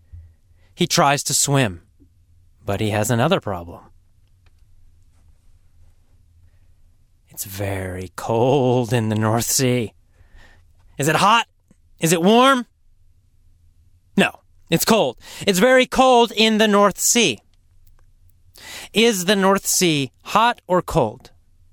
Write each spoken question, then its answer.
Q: Is the North Sea hot or cold?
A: Well, it's cold. It's very cold in the North Sea.